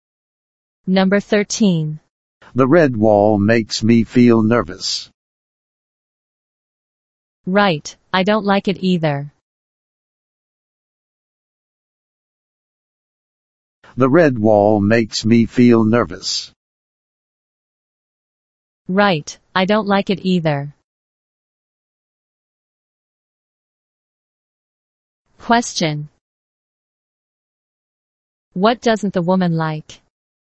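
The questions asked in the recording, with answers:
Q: What doesn't the woman like?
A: The red wall.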